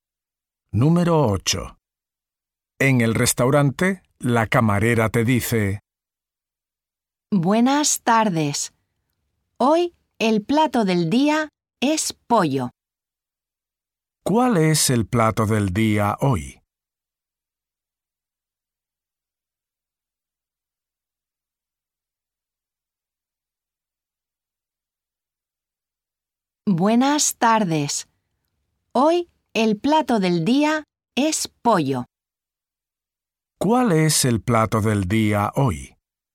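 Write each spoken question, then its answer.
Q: ¿Cuál es el plato del día hoy?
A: Pollo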